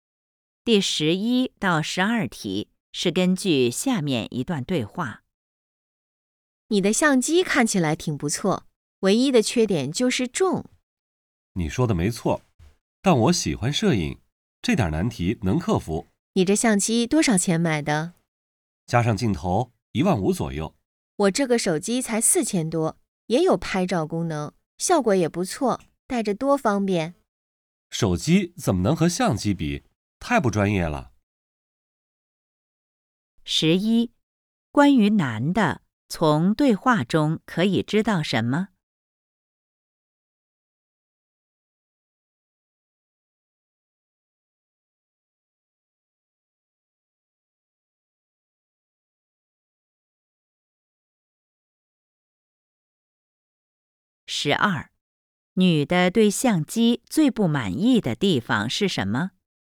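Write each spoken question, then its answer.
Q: 女的对相机最不满意的地方是什么?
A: 太重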